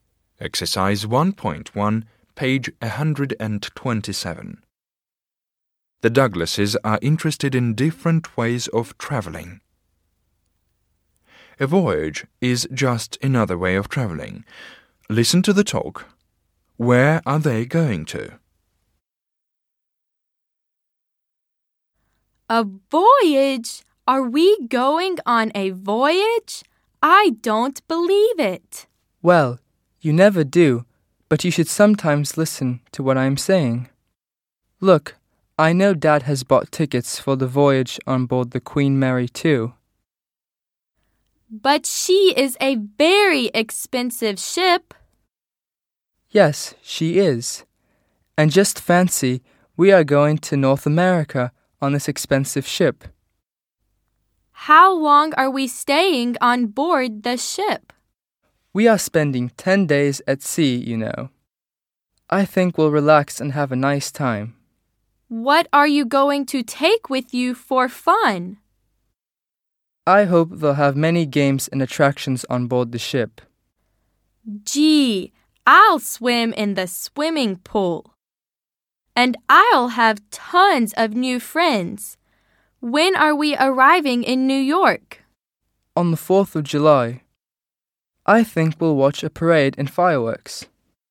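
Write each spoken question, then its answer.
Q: Where are they going to?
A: North America (New York)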